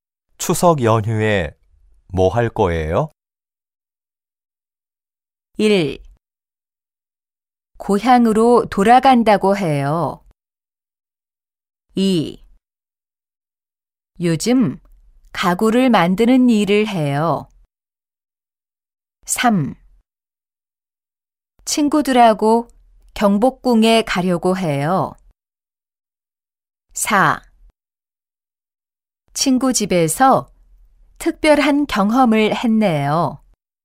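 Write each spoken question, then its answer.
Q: 추석 연휴에 뭐할 거예요?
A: 3: 친구들하고 경복궁에 가려고 해요.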